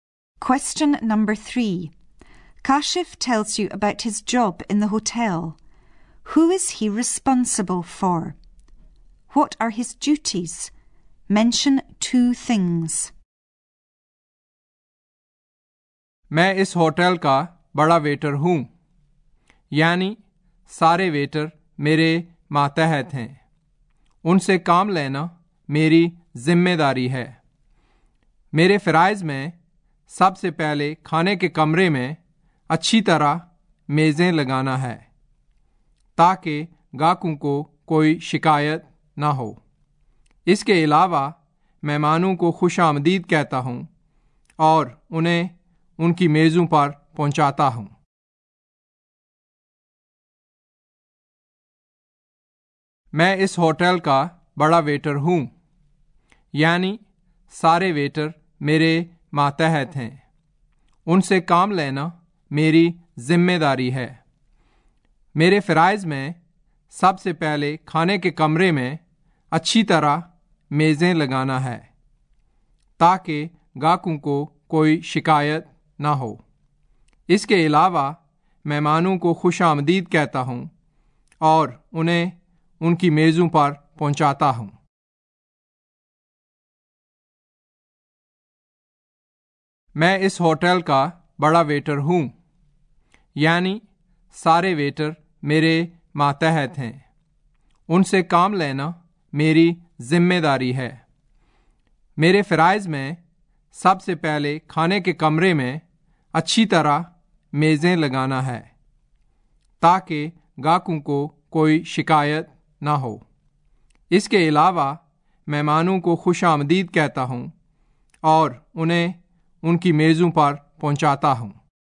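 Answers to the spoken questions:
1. All the waiters (he is head waiter)
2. Setting the tables properly in the dining room; welcoming guests and showing them to their tables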